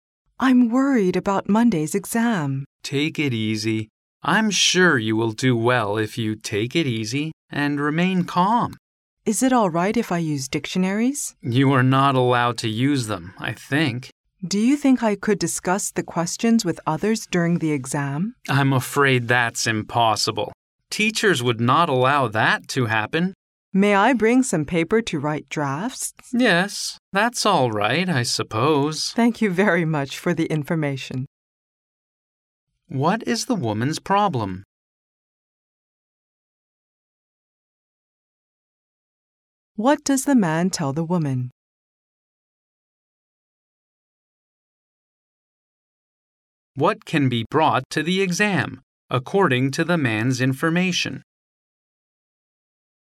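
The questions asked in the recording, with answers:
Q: What is the woman's problem?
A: She is worried about Monday's exam.

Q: What can be brought to the exam, according to the man's information?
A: Paper to write drafts.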